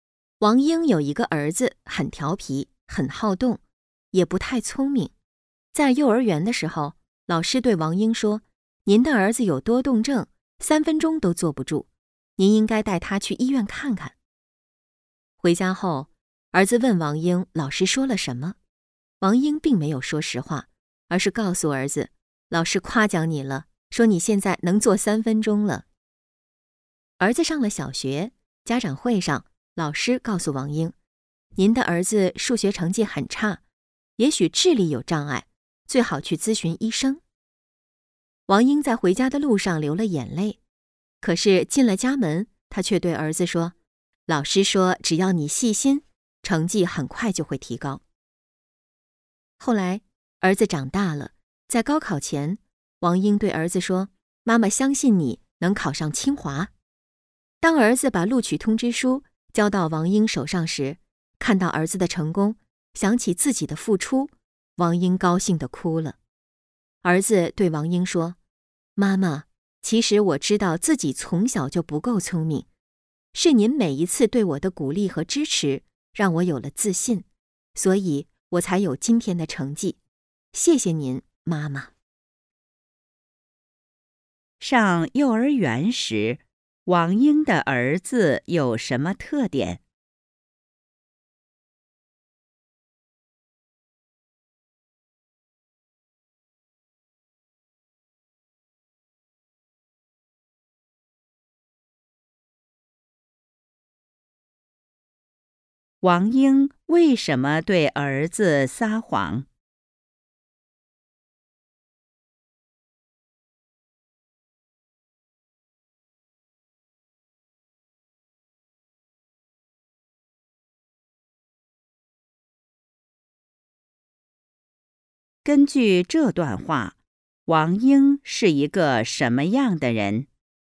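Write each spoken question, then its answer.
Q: 上幼儿园时,王英的儿子有什么特点?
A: 很调皮,很好动,坐不住(三分钟都坐不住),不太聪明

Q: 王英为什么对儿子撒谎?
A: 为了鼓励儿子,让他有自信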